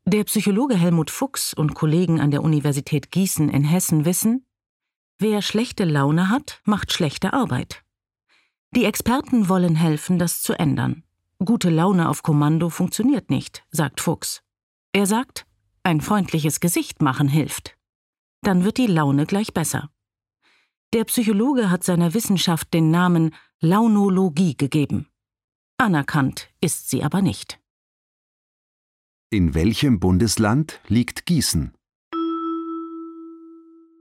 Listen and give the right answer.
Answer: In Hessen.